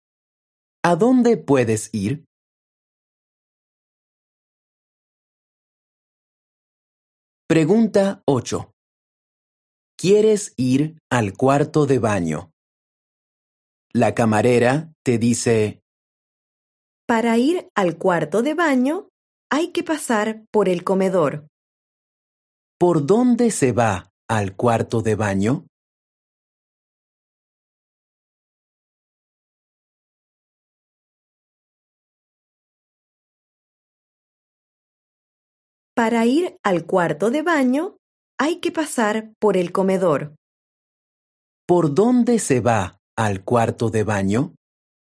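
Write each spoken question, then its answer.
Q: ¿Por dónde se va al cuarto de baño?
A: por el comedor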